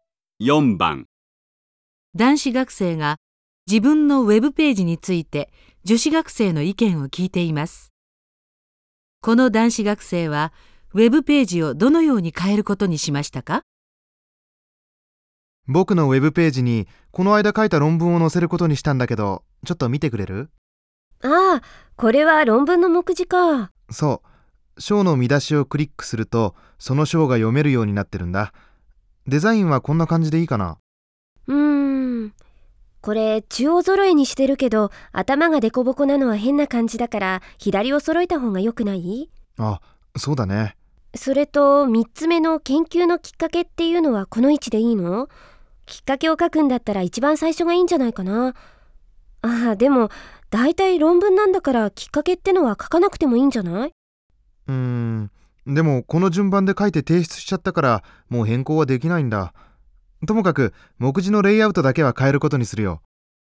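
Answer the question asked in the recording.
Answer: 目次を中央揃えから左揃えに変える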